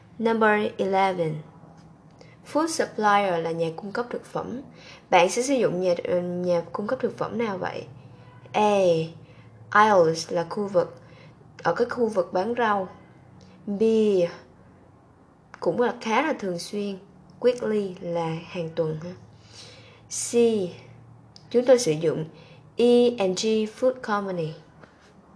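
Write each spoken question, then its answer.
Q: Bạn sẽ sử dụng nhà cung cấp thực phẩm nào vậy?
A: C: Chúng tôi sử dụng E&G Food Company.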